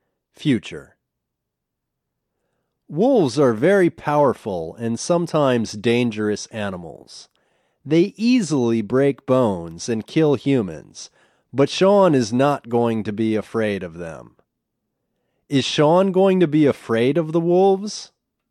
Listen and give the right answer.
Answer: No, he's not going to be afraid.